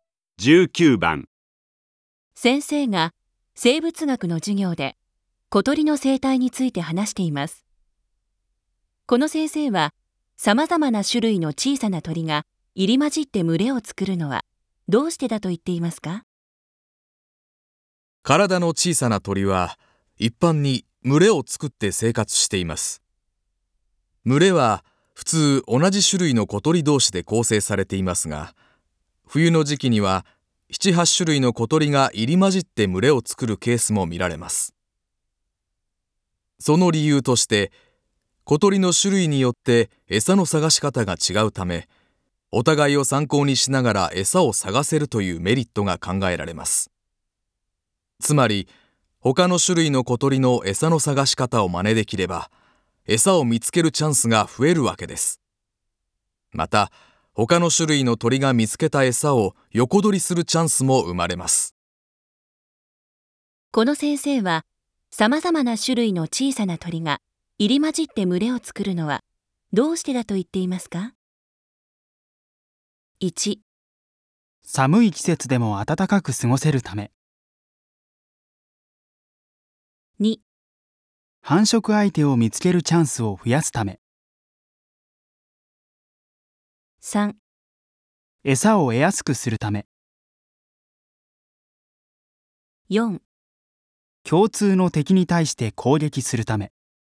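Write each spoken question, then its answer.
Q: この先生は、さまざまな種類の小さな鳥が入り混じって群れを作るのはどうしてだと言っていますか?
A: 3: 餌を得やすくするため。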